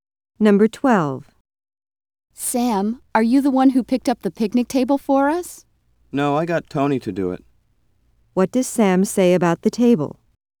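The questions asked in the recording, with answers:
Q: What does Sam say about the table?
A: He had Tony pick it up.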